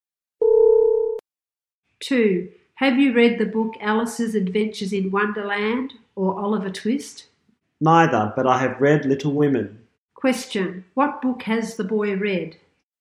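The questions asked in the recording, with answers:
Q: Question, what book has the boy read?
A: Little Women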